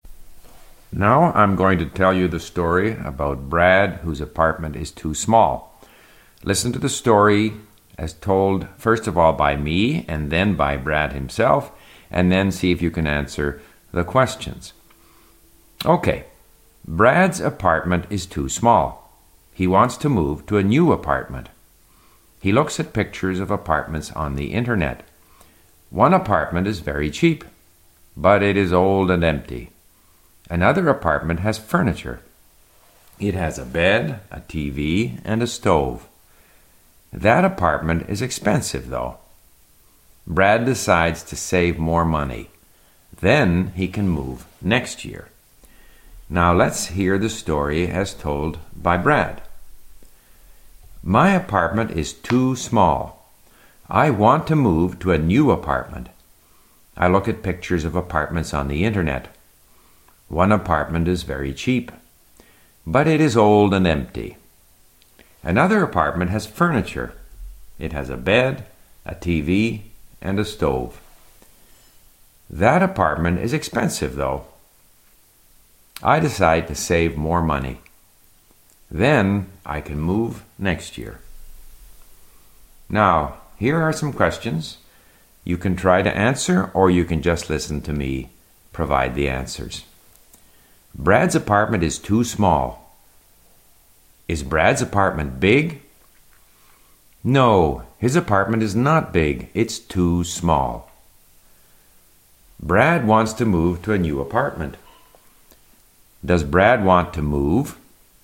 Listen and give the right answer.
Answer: Yes, Brad wants to move to a new apartment.